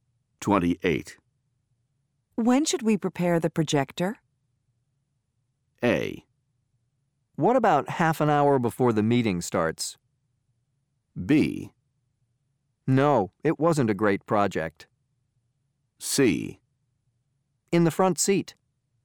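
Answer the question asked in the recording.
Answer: A: What about half an hour before the meeting starts?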